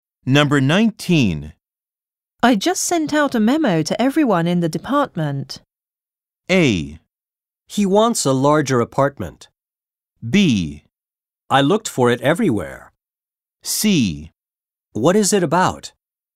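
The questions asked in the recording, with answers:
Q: I just sent out a memo to everyone in the department.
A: C: What is it about?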